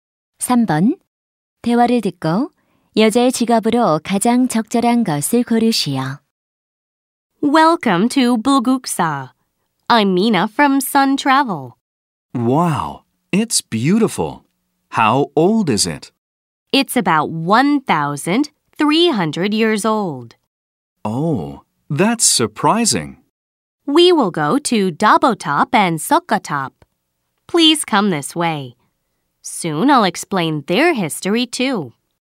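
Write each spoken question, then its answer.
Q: 대화를 듣고 여자의 직업으로 가장 적절한 것을 고르시오.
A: 여행 가이드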